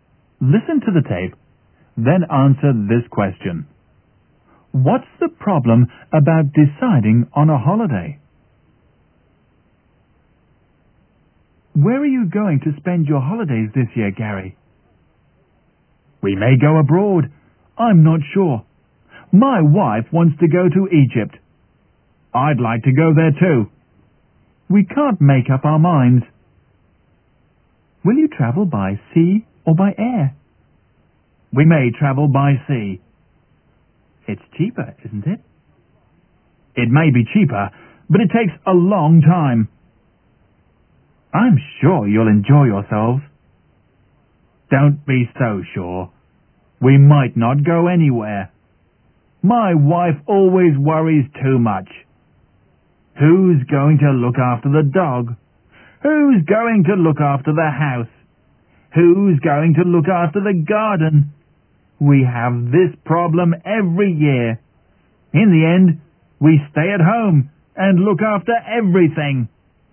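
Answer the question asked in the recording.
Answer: Gary's wife worries too much about who will look after the dog, the house and the garden, so they can't decide and end up staying at home.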